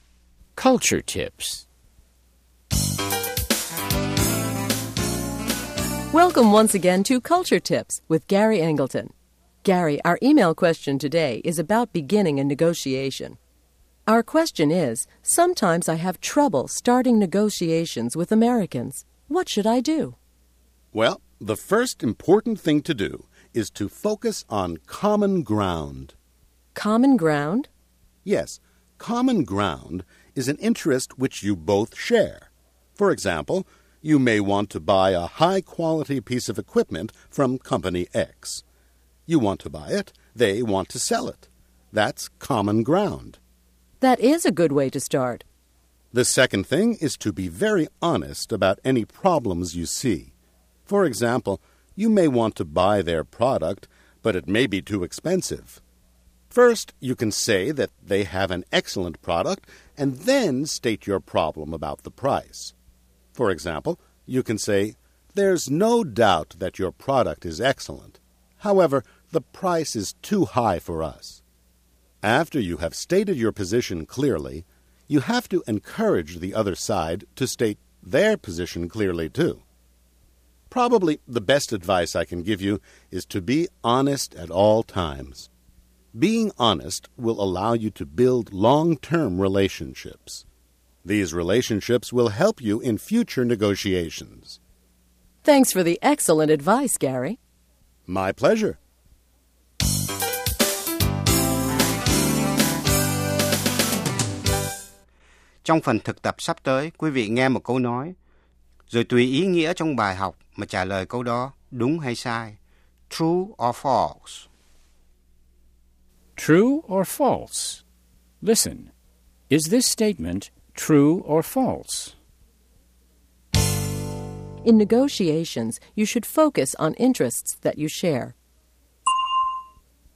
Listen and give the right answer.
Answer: True. If you can't find any common ground, there is nothing to negotiate.